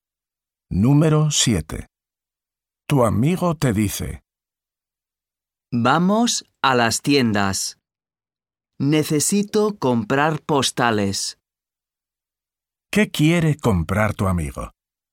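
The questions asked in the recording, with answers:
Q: ¿Qué quiere comprar tu amigo?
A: Postales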